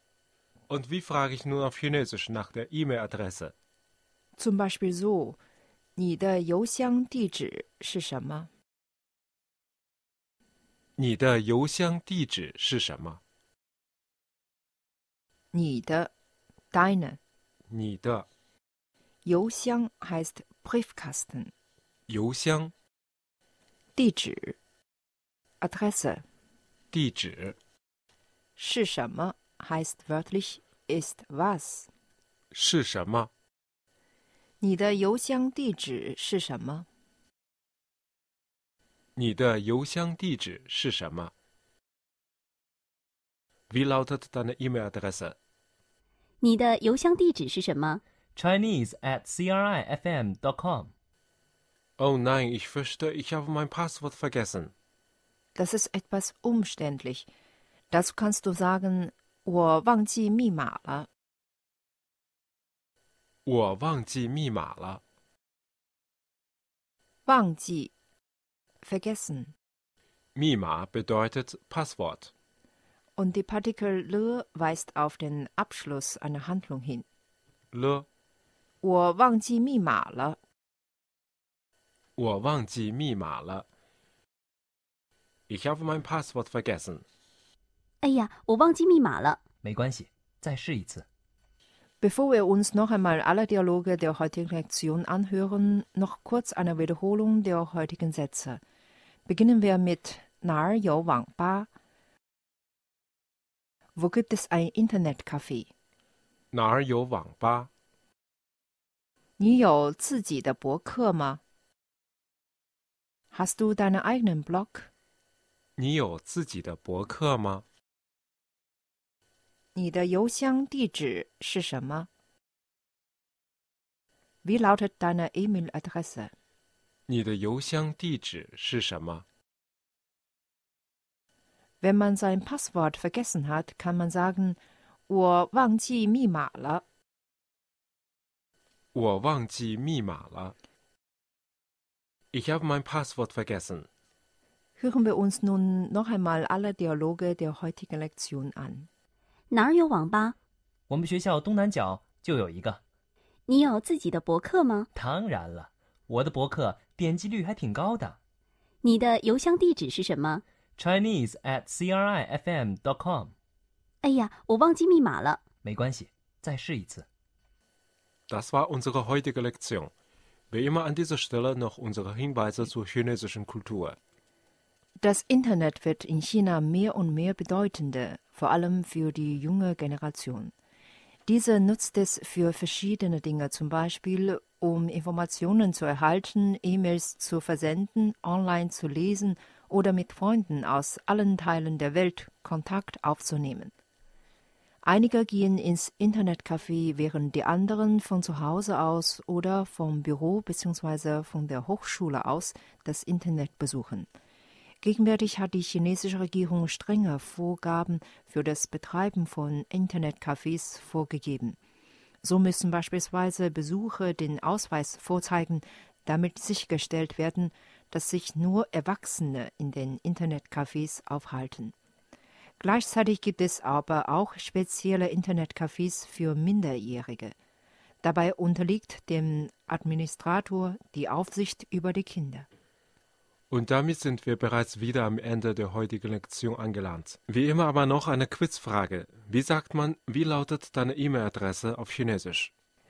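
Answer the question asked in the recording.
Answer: 你的邮箱地址是什么?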